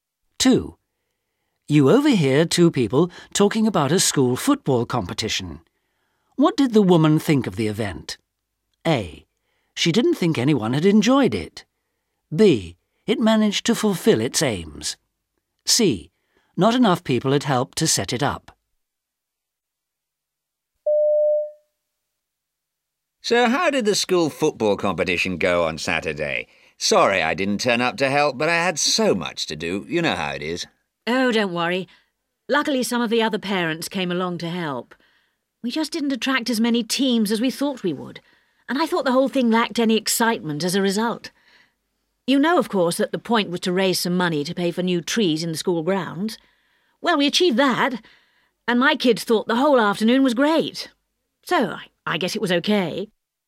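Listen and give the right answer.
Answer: B: It managed to fulfil its aims.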